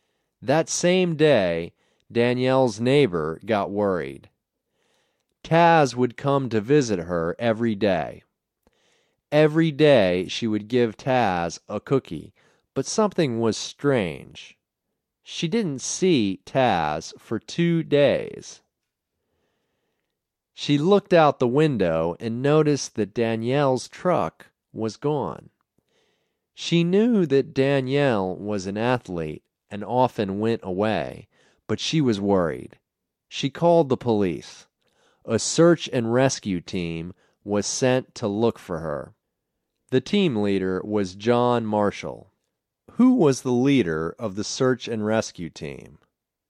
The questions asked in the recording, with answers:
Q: Who was the leader of the search and rescue team?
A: John was the leader.